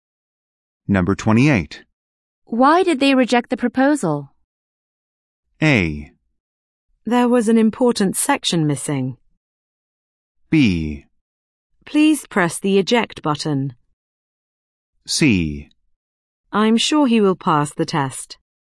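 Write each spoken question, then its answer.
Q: Why did they reject the proposal?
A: A: There was an important section missing.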